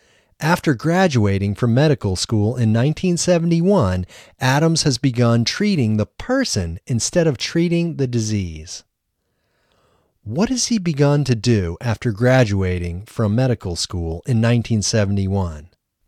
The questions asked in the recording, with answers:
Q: What has he begun to do after graduating from medical school in 1971?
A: After graduating from medical school in 1971, Adams has begun treating the person instead of treating the disease.